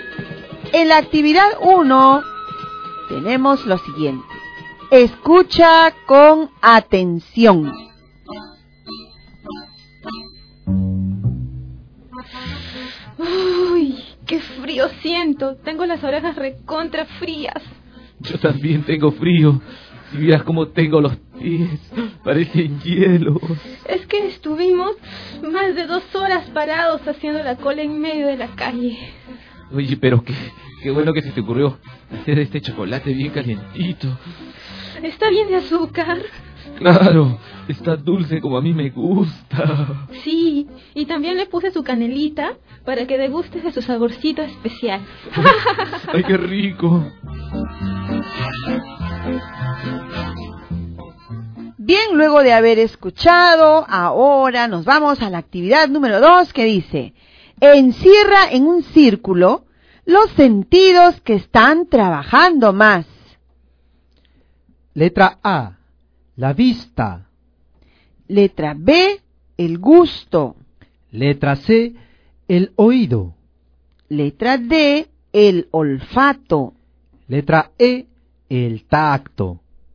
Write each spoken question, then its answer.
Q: encierra en un círculo los sentidos que están trabajando más.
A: a mí me parece que las respuestas estaban en las alternativas B y E.